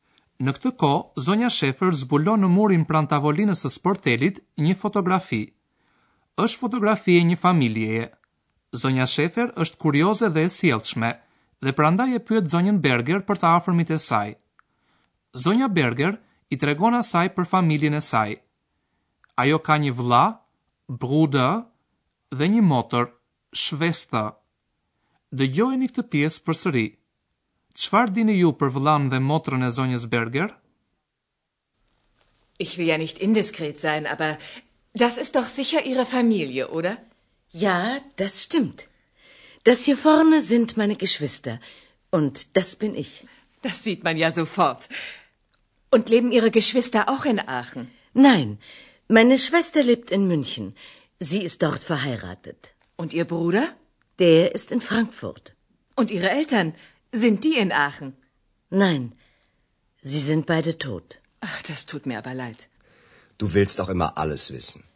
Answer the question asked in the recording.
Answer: Motra e zonjës Berger është e martuar dhe jeton në Münih.